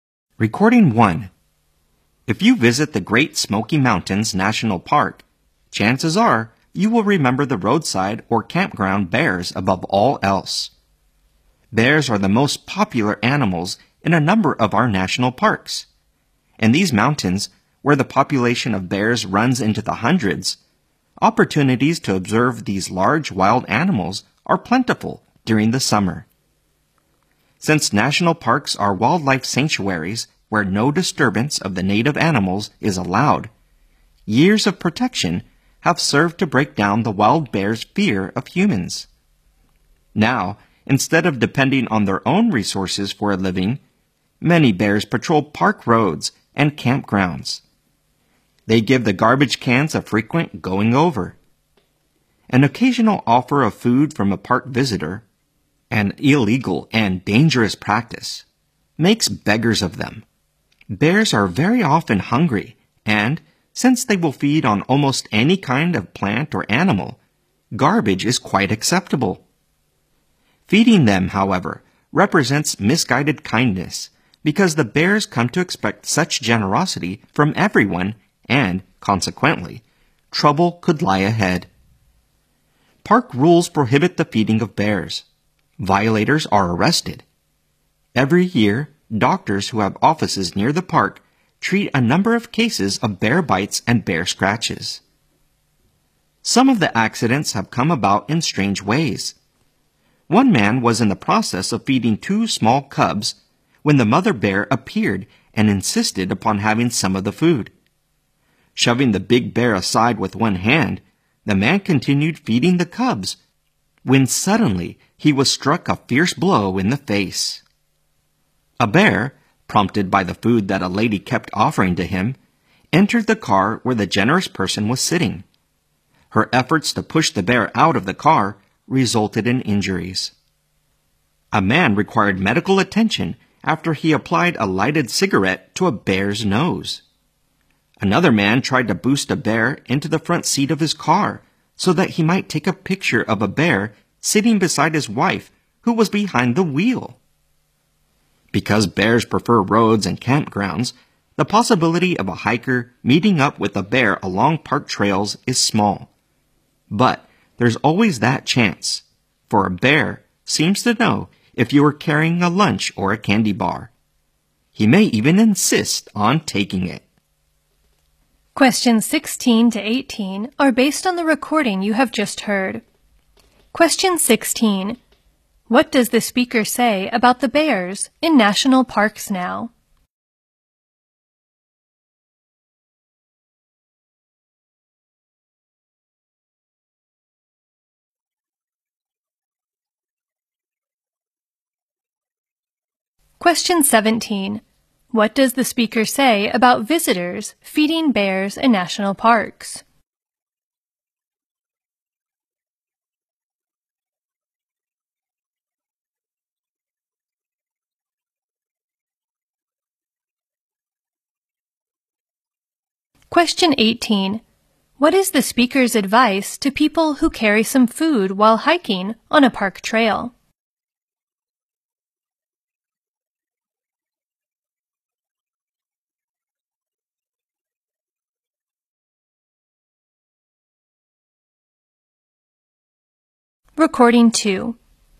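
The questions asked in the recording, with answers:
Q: What does the speaker say about the bears in national parks now?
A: They have lost their fear of humans and patrol roads and campgrounds for food

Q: What does the speaker say about visitors feeding bears in national parks?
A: It is illegal, dangerous, misguided kindness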